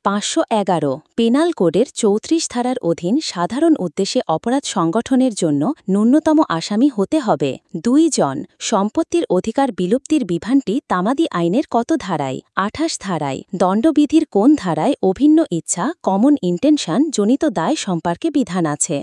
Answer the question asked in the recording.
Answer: ৩৪ ধারায়।